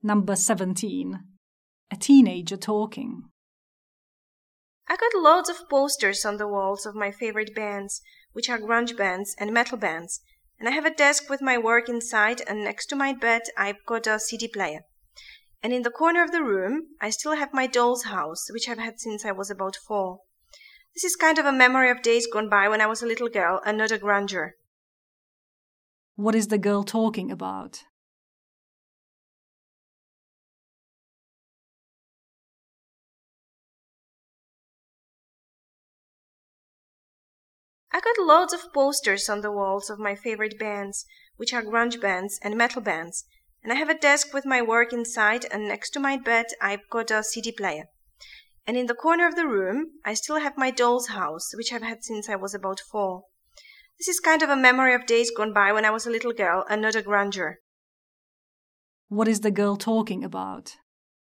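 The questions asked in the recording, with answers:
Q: What is the girl talking about?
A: Her bedroom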